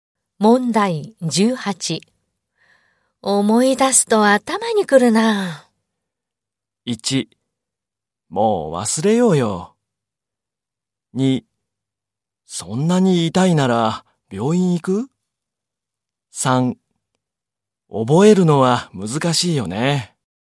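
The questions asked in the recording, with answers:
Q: 思い出すと頭にくるな。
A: 2: もう忘れようよ。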